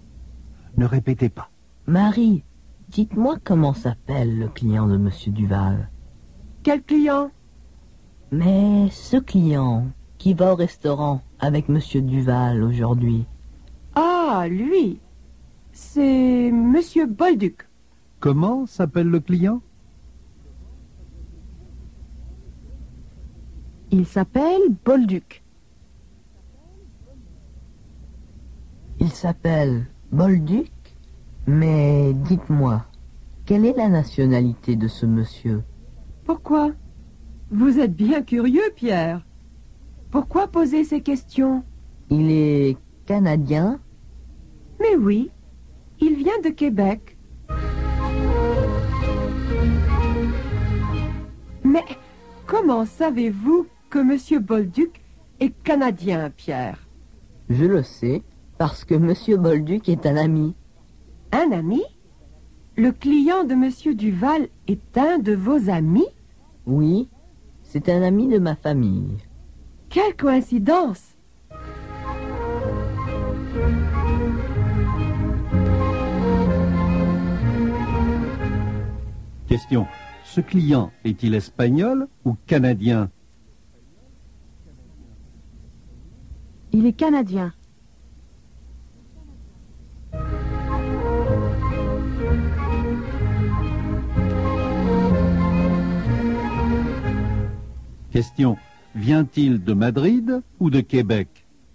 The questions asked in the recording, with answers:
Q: Ce client est-il espagnol ou canadien?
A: Il est canadien.

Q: Vient-il de Madrid ou de Québec?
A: Il vient de Québec.